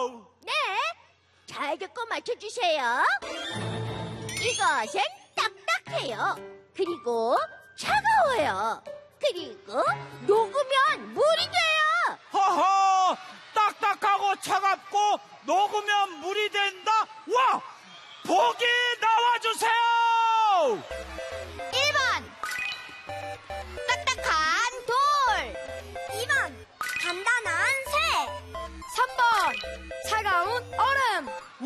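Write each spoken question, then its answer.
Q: 딱딱하고 차갑고 녹으면 물이 된다?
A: 3: 차가운 얼음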